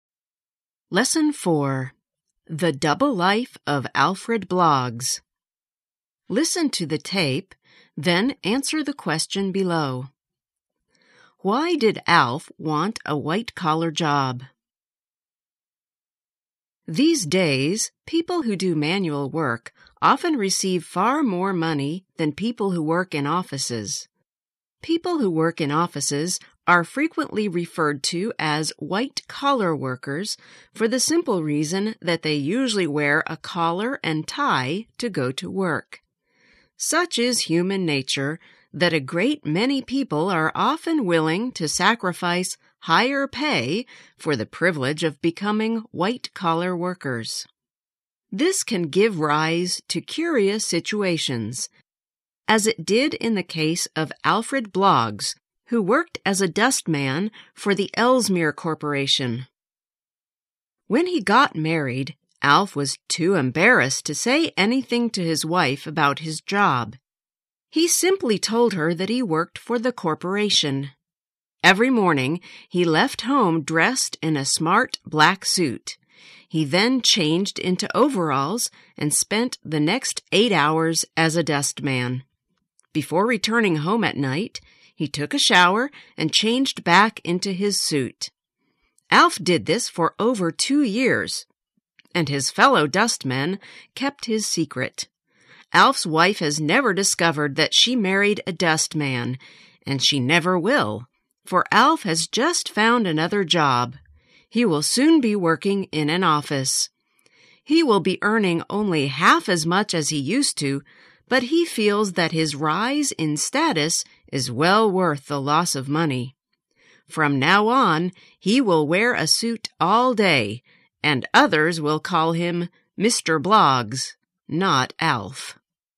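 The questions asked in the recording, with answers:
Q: Why did Alf want a white-collar job?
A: He felt the rise in status was worth the loss of money (he was embarrassed to be a dustman).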